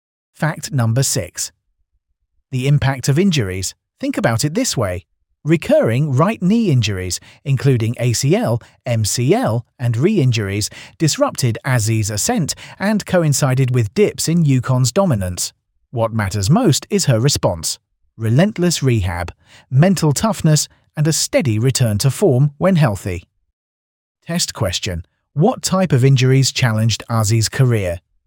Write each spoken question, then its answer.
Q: What type of injuries challenged Azzy's career?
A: Correct answer. Knee injuries.